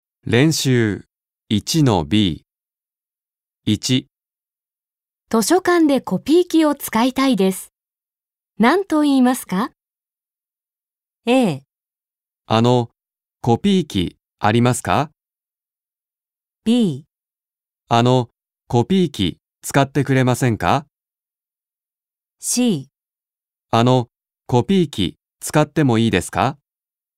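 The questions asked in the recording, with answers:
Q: 図書館でコピー機を使いたいです。何と言いますか?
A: C: あの、コピー機使ってもいいですか?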